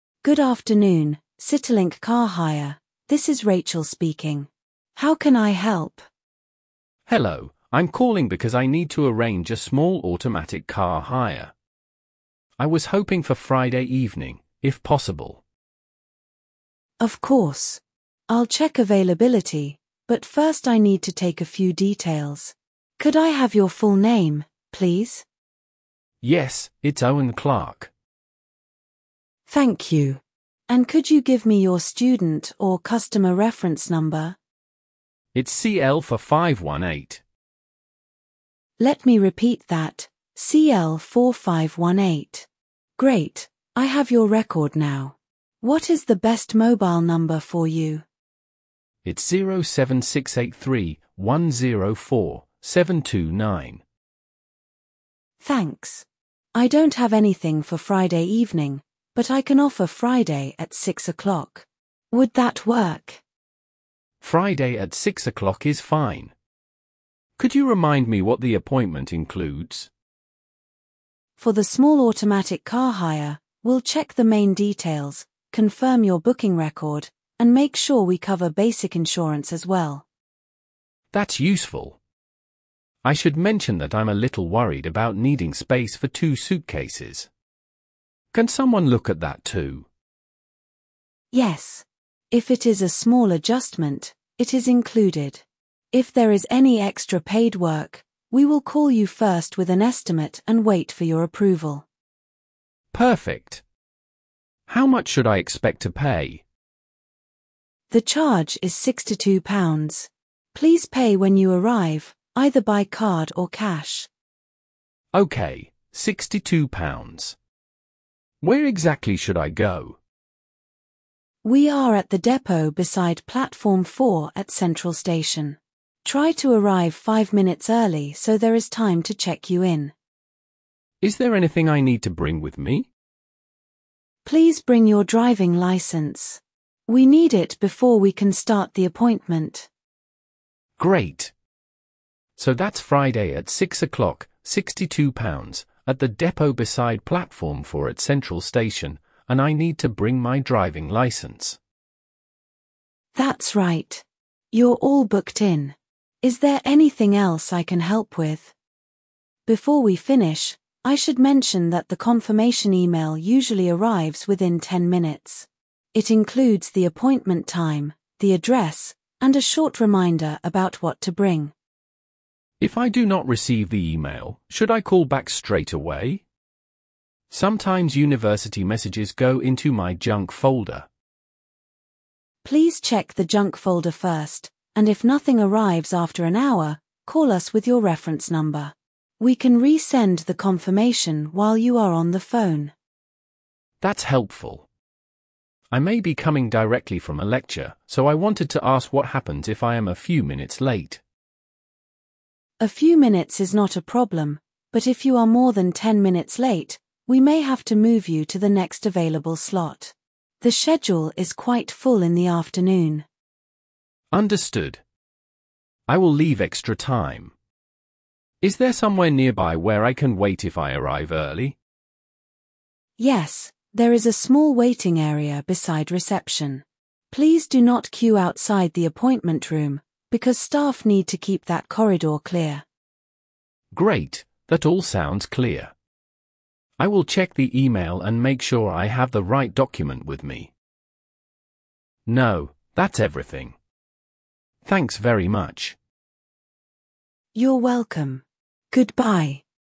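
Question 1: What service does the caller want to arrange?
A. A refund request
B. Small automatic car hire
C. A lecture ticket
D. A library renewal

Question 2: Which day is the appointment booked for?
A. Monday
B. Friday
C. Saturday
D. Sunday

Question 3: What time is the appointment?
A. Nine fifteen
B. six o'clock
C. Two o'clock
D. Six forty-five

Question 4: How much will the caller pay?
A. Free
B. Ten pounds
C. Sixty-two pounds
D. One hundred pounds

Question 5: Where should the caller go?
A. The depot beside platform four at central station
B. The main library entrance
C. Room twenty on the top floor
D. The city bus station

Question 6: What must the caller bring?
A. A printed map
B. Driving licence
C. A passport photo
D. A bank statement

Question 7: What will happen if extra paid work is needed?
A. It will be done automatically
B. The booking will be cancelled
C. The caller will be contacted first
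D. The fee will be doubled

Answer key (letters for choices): 1B, 2B, 3B, 4C, 5A, 6B, 7C

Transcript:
Staff: Good afternoon, CityLink Car Hire, this is Rachel speaking. How can I help?
Student: Hello, I'm calling because I need to arrange a small automatic car hire. I was hoping for Friday evening, if possible.
Staff: Of course. I'll check availability, but first I need to take a few details. Could I have your full name, please?
Student: Yes, it's Owen Clarke.
Staff: Thank you. And could you give me your student or customer reference number?
Great, I have your record now. What is the best mobile number for you?
Staff: Thanks. I don't have anything for Friday evening, but I can offer Friday at six o'clock. Would that work?
Student: Friday at six o'clock is fine. Could you remind me what the appointment includes?
Staff: For the small automatic car hire, we'll check the main details, confirm your booking record, and make sure we cover basic insurance as well.
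Student: That's useful. I should mention that I'm a little worried about needing space for two suitcases. Can someone look at that too?
Staff: Yes. If it is a small adjustment, it is included. If there is any extra paid work, we will call you first with an estimate and wait for your approval.
Student: Perfect. How much should I expect to pay?
Staff: The charge is sixty-two pounds. Please pay when you arrive, either by card or cash.
Student: Okay, sixty-two pounds. Where exactly should I go?
Staff: We are at the depot beside platform four at Central Station. Try to arrive five minutes early so there is time to check you in.
Student: Is there anything I need to bring with me?
Staff: Please bring your driving licence. We need it before we can start the appointment.
Student: Great. So that's Friday at six o'clock, sixty-two pounds, at the depot beside platform four at Central Station, and I need to bring my driving licence.
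Staff: That's right. You're all booked in. Is there anything else I can help with?
Staff: Before we finish, I should mention that the confirmation email usually arrives within ten minutes. It includes the appointment time, the address, and a short reminder about what to bring.
Student: If I do not receive the email, should I call back straight away? Sometimes university messages go into my junk folder.
Staff: Please check the junk folder first, and if nothing arrives after an hour, call us with your reference number. We can resend the confirmation while you are on the phone.
Student: That's helpful. I may be coming directly from a lecture, so I wanted to ask what happens if I am a few minutes late.
Staff: A few minutes is not a problem, but if you are more than ten minutes late, we may have to move you to the next available slot. The schedule is quite full in the afternoon.
Student: Understood. 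I will leave extra time. Is there somewhere nearby where I can wait if I arrive early?
Staff: Yes, there is a small waiting area beside reception. Please do not queue outside the appointment room, because staff need to keep that corridor clear.
Student: Great, that all sounds clear. I will check the email and make sure I have the right document with me.
Student: No, that's everything. Thanks very much.
Staff: You're welcome. Goodbye.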